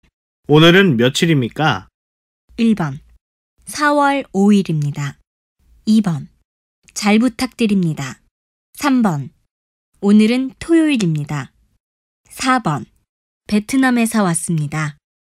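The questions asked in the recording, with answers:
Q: 오늘은 며칠입니까?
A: 1: 4월 5일입니다.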